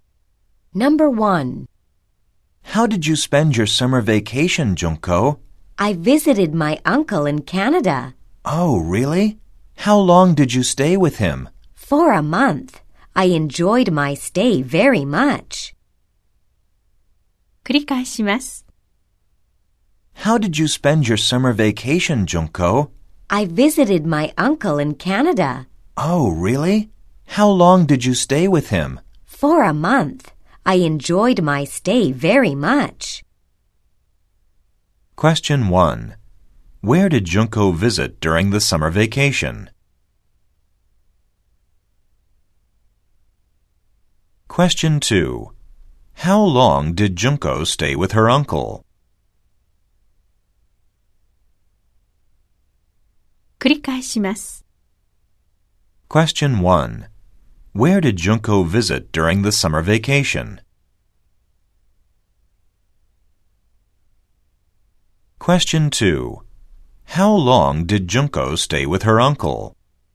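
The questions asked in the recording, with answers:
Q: Where did Junko visit during the summer vacation?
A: Canada (her uncle in Canada)

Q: How long did Junko stay with her uncle?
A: For a month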